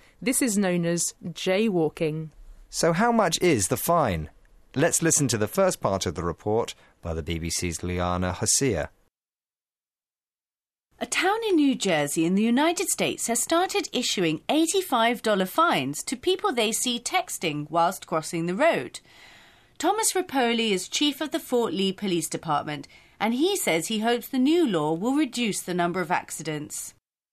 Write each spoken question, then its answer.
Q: So how much is the fine?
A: It's $85, which is a really expensive text message.